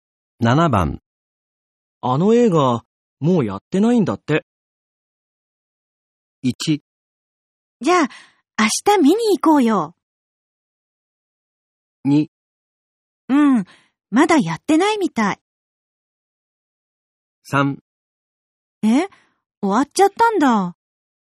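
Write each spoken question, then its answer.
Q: あの映画、もうやってないんだって。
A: 3: え、終わっちゃったんだ。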